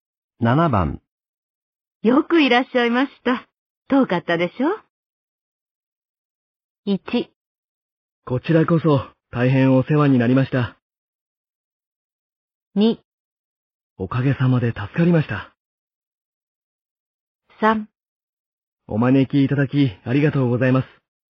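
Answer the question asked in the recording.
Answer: 3: お招きいただきありがとうございます。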